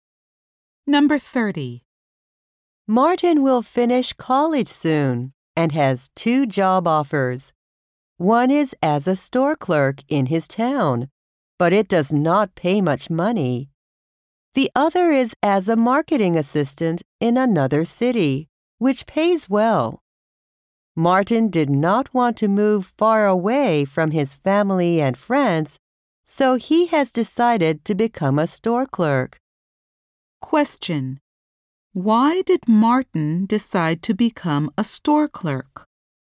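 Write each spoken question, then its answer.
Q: Why did Martin decide to become a store clerk?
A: He did not want to move far away from his family and friends.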